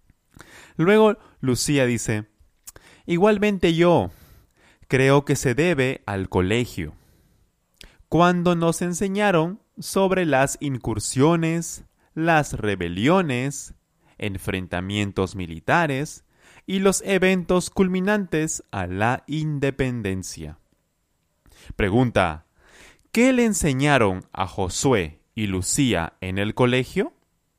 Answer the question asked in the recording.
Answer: A Josué y Lucía le enseñaron sobre las incursiones, las rebeliones, enfrentamientos militares y los eventos culminantes a la independencia.